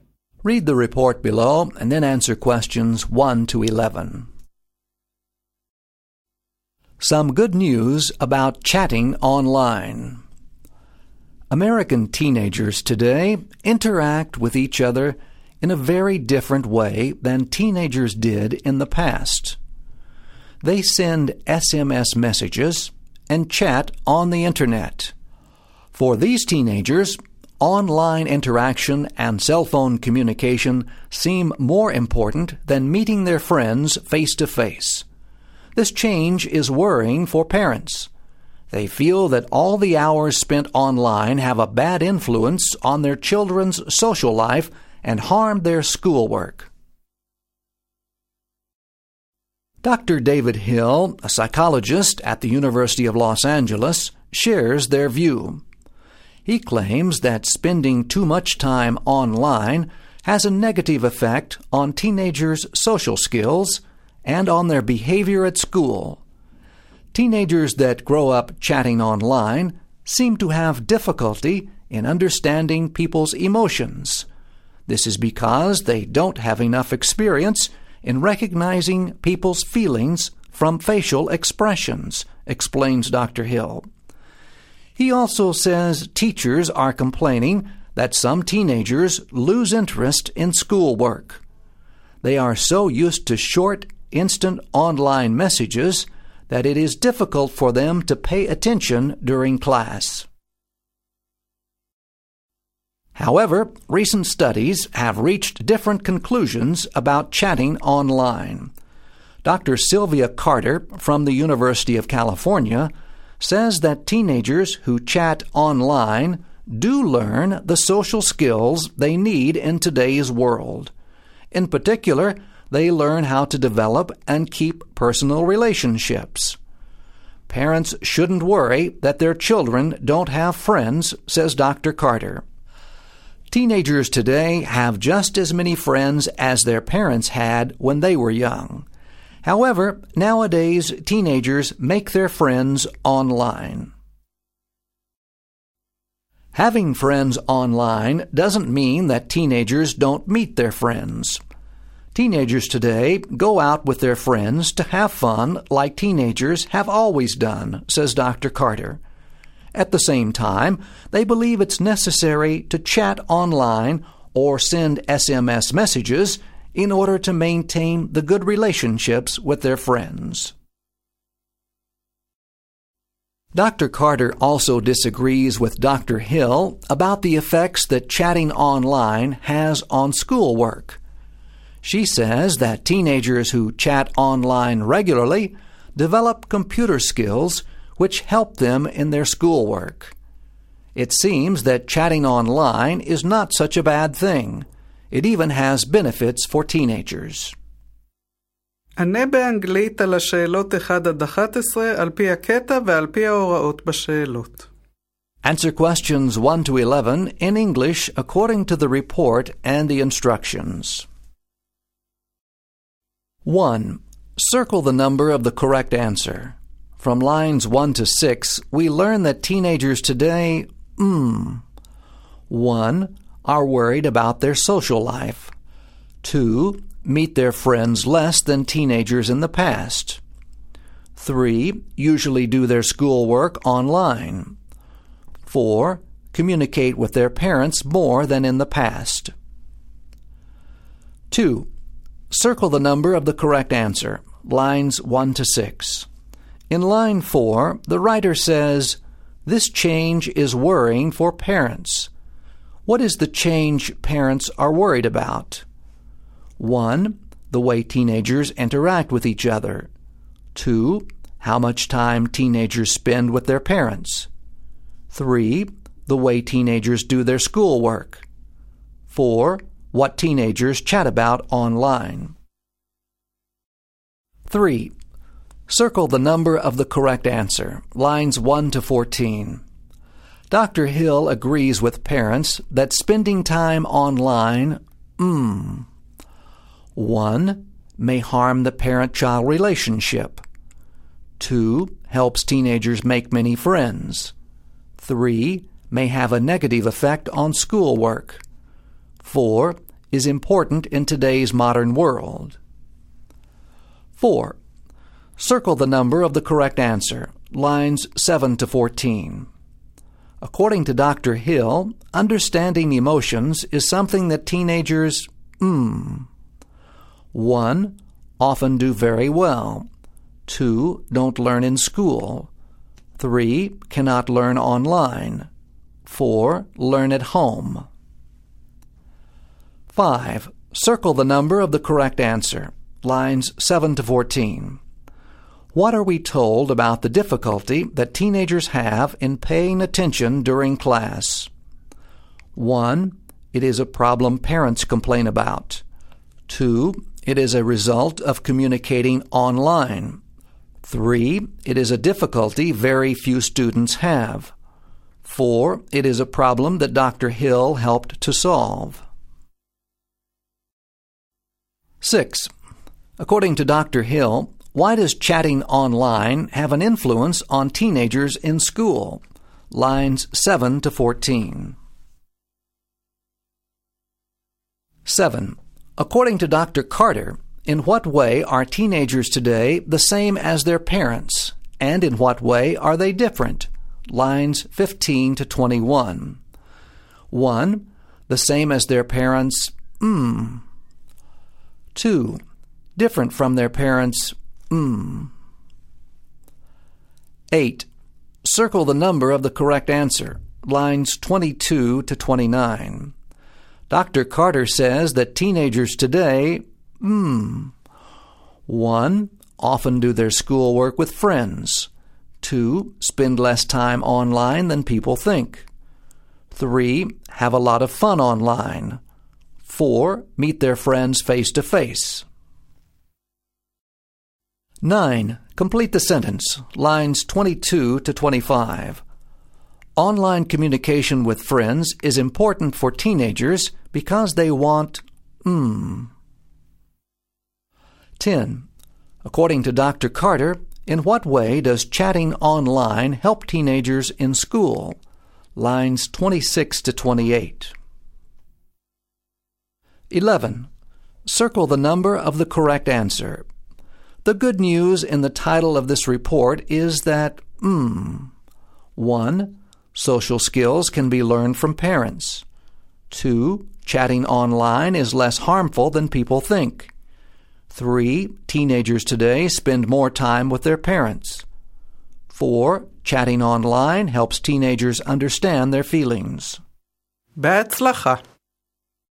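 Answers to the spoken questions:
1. 2: Meet their friends less than teenagers in the past.
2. 1: The way teenagers interact with each other.
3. 3: May have a negative effect on schoolwork.
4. 3: Cannot learn online.
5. 2: It is a result of communicating online.
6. They are used to short, instant online messages, so it is hard for them to pay attention in class.
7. Same: they have as many friends; different: they make their friends online.
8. 4: Meet their friends face-to-face.
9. to maintain good relationships with their friends
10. They develop computer skills that help them with their schoolwork.
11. 2: Chatting online is less harmful than people think.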